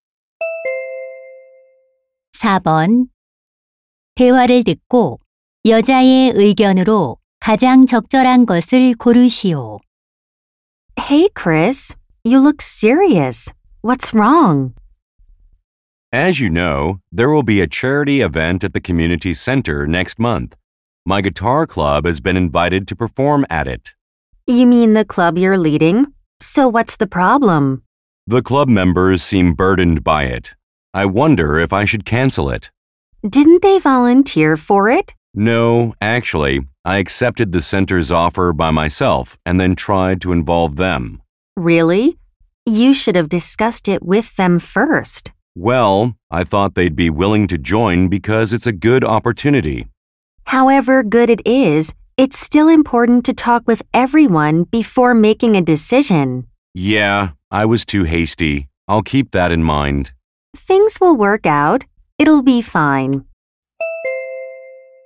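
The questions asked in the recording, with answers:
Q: 대화를 듣고 여자의 의견으로 가장 적절한 것을 고르시오.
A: 결정하기 전에 구성원들과 먼저 상의해야 한다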